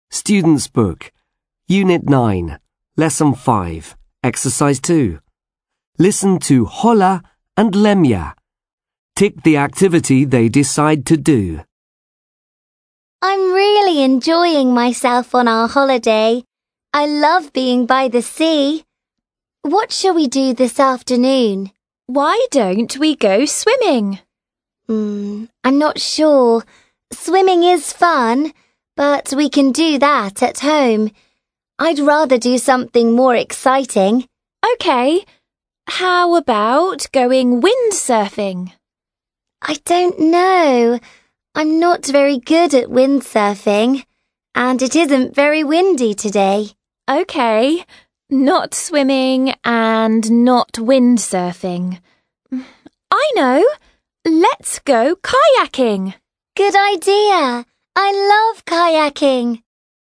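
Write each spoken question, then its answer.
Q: Tick the activity they decide to do.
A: kayaking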